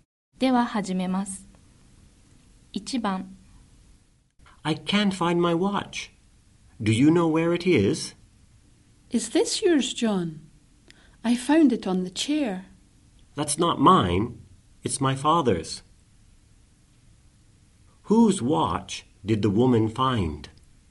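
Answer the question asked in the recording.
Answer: John's father's watch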